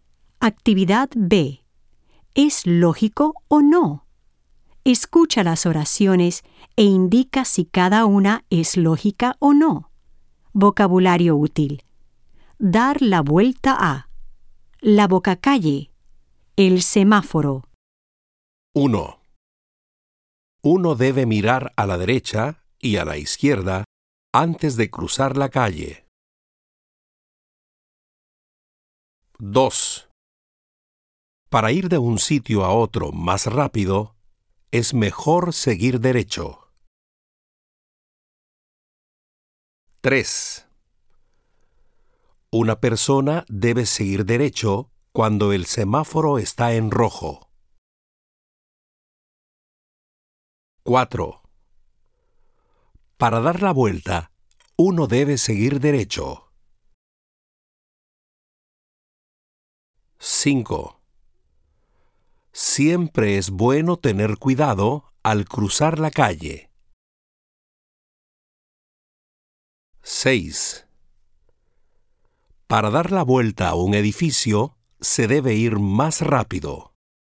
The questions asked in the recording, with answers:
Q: Uno debe mirar a la derecha y a la izquierda antes de cruzar la calle.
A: 1. Lógico.

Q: Para ir de un sitio a otro más rápido, es mejor seguir derecho.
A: 2. Lógico.

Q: Una persona debe seguir derecho cuando el semáforo está en rojo.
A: 3. Ilógico.

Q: Para dar la vuelta, uno debe seguir derecho.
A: 4. Ilógico.

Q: Siempre es bueno tener cuidado al cruzar la calle.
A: 5. Lógico.

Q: Para dar la vuelta a un edificio, se debe ir más rápido.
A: 6. Ilógico.